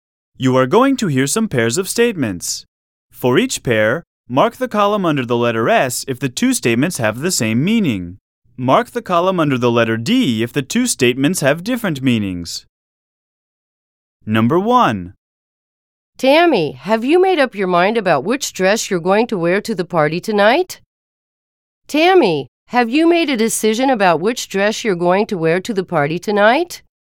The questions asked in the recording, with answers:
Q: Tammy, have you made a decision about which dress you're going to wear to the party tonight?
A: Same is the correct answer.